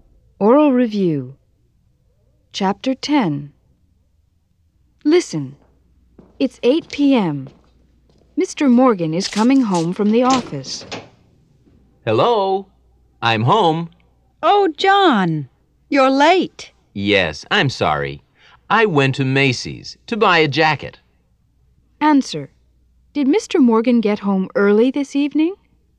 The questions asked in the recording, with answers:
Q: Did Mr. Morgan get home early this evening?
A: No, he didn't.